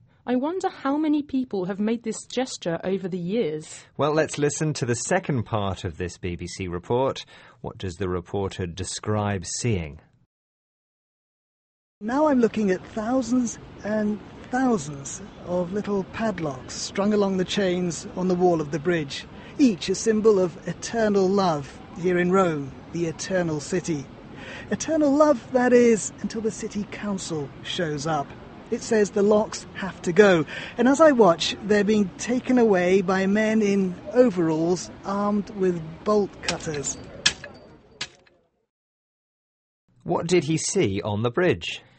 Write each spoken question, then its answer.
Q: What does the reporter describe seeing?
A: The reporter described seeing thousands and thousands of padlocks attached to the bridge.